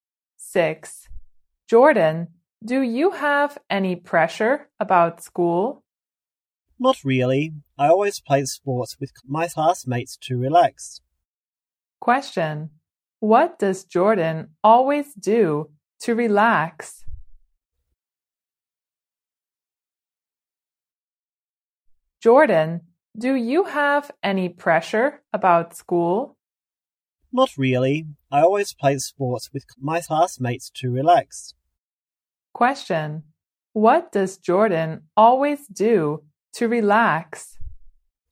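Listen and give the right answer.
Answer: He plays sports with his classmates.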